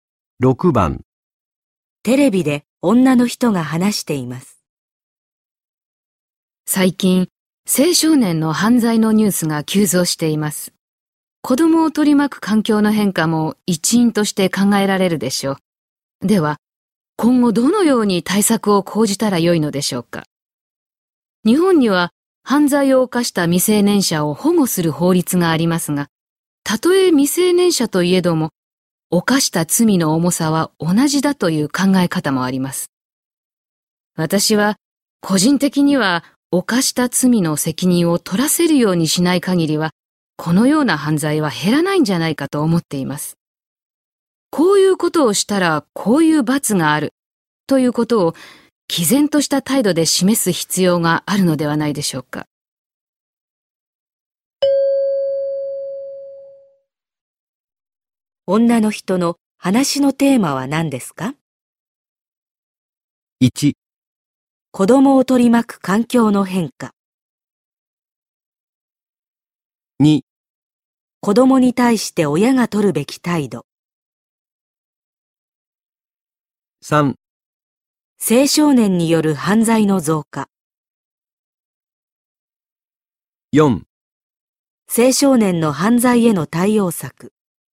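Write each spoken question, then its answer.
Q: 女の人の話のテーマは何ですか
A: 4: 青少年の犯罪への対応策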